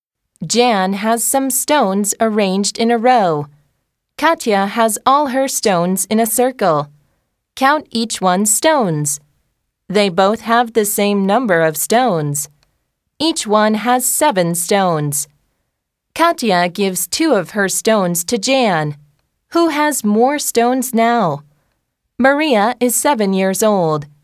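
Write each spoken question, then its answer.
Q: Who has more stones now?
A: Jan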